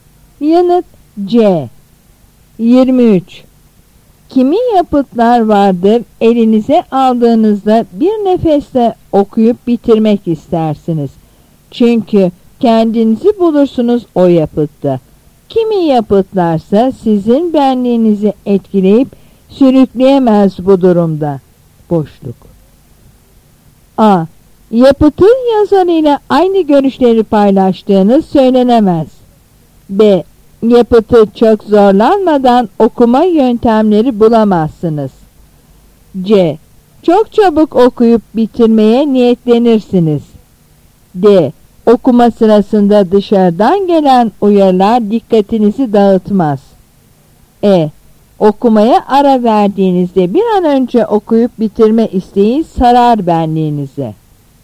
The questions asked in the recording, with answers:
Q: Boşluk.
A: Yanıt A.